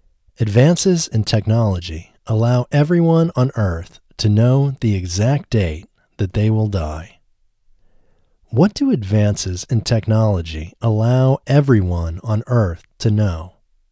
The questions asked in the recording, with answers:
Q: What do advances in technology allow everyone on Earth to know?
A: Advances in technology allow everyone on Earth to know the exact day they will die.